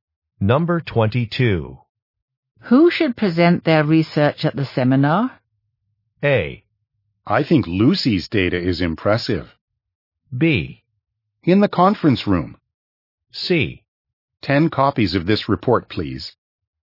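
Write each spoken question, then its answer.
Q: Who should present their research at the seminar?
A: A: I think Lucy's data is impressive.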